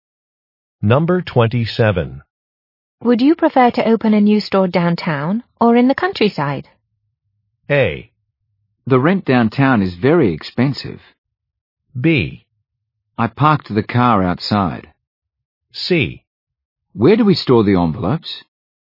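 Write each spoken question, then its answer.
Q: Would you prefer to open a new store downtown or in the countryside?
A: A: The rent downtown is very expensive.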